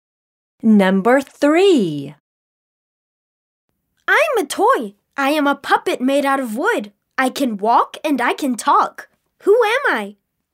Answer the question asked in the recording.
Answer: I am Pinocchio.